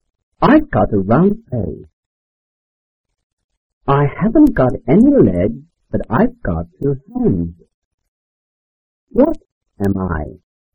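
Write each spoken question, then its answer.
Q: What am I?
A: a clock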